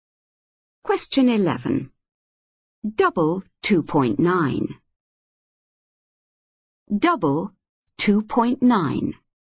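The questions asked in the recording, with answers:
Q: Double 2.9.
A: 5.8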